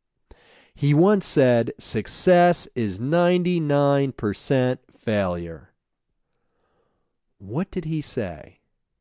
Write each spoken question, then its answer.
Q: What did he say?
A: He said, "Success is 99% failure."